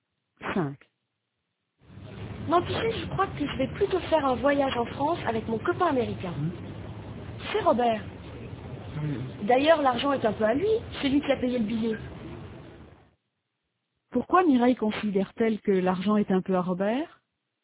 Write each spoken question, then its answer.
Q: Pourquoi Mireille considère-t-elle que l'argent est un peu à Robert?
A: Parce que c'est lui qui a acheté le billet.